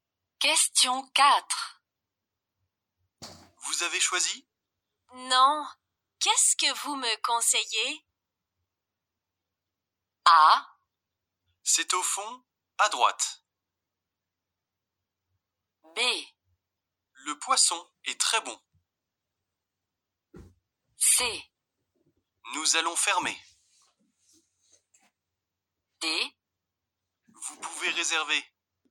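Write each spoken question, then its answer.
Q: Vous avez choisi ? Non. Qu'est-ce que vous me conseillez ?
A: B: Le poisson est très bon.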